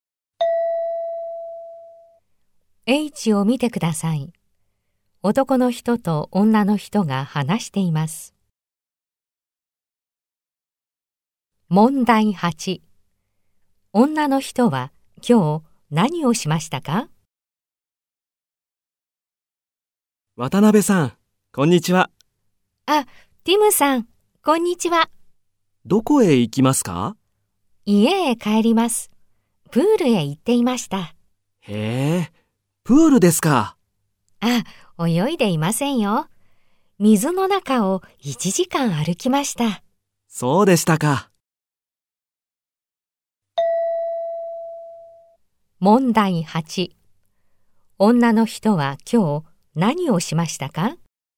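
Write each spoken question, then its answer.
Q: 女の人は今日何をしましたか?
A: プールで1時間水の中を歩きました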